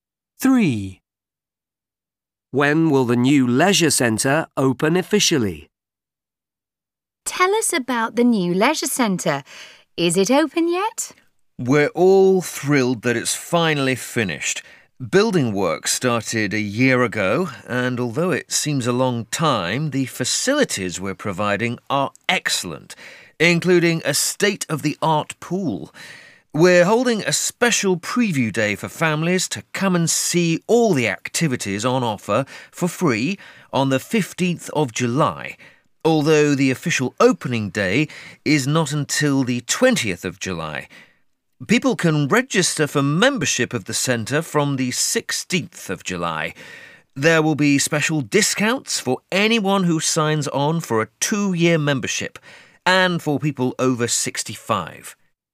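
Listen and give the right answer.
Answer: the 20th of July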